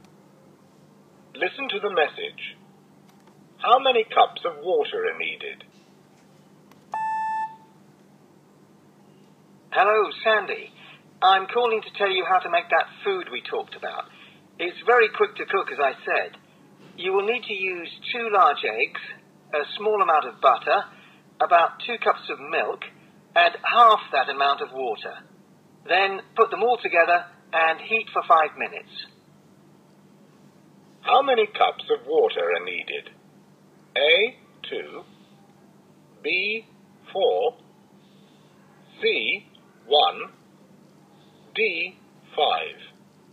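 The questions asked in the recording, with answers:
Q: How many cups of water are needed?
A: C: 1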